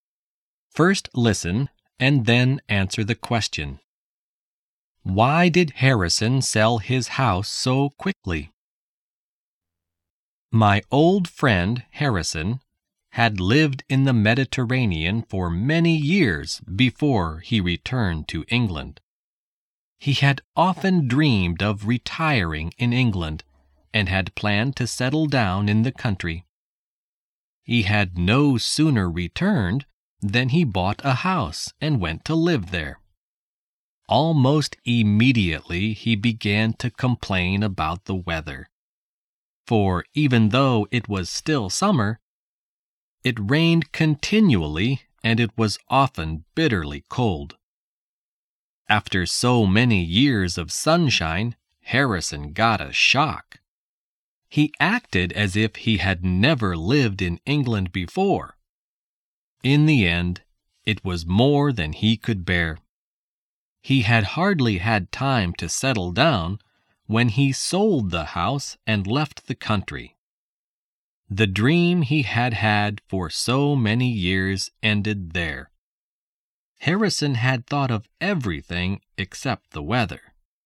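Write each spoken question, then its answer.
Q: Why did Harrison sell his house so quickly?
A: Because he couldn't bear the English weather: it rained continually and was often bitterly cold.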